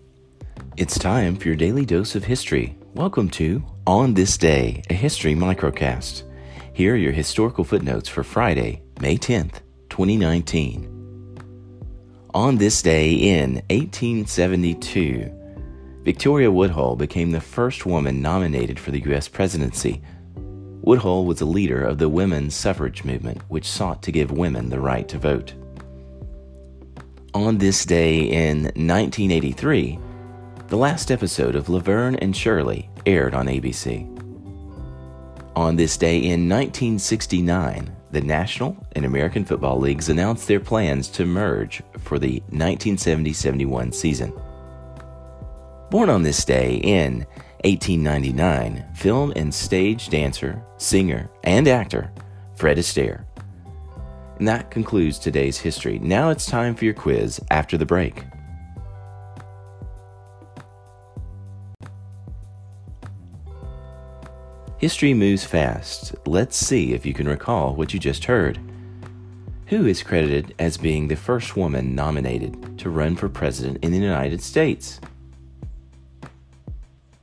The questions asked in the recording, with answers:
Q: Who is credited as being the first woman nominated to run for president in the United States?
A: Victoria Woodhull.